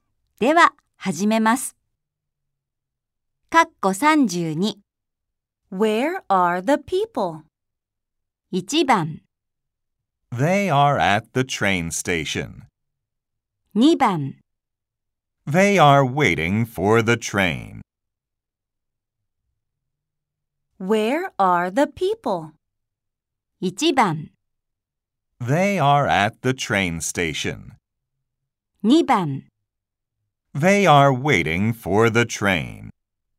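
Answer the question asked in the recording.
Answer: 1: They are at the train station.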